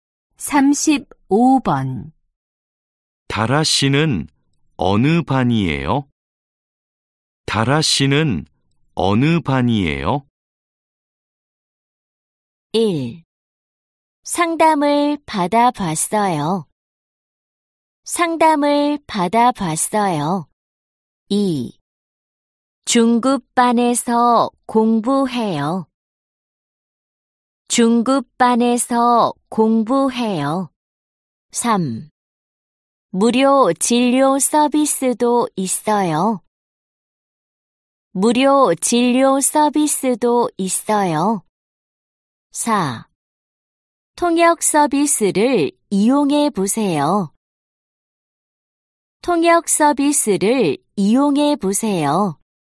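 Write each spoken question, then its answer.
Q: 다라 씨는 어느 반이에요?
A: 2: 중급반에서 공부해요.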